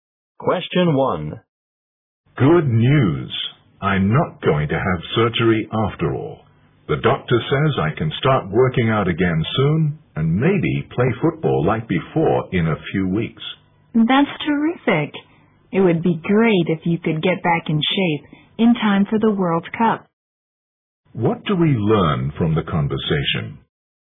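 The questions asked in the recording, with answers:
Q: What do we learn from the conversation?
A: The man won't need surgery and may soon play football again.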